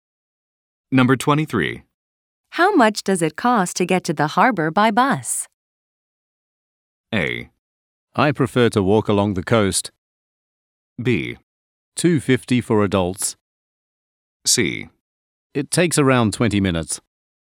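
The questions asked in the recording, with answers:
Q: How much does it cost to get to the harbor by bus?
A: B: $2.50 for adults.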